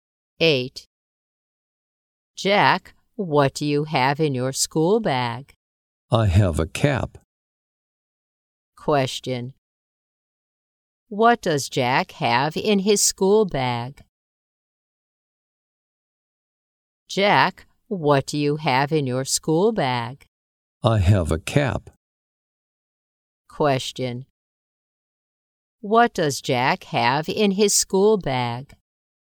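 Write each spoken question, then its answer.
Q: What does Jack have in his school bag?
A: A cap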